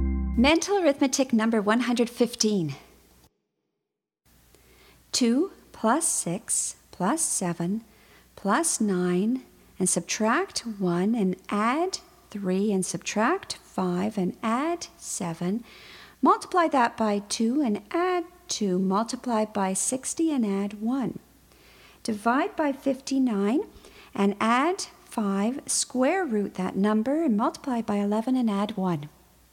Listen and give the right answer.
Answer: And the answer is 89.